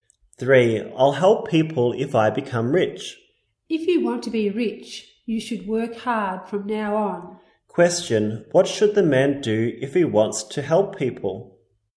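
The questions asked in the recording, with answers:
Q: What should the man do if he wants to help people?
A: Work hard from now on.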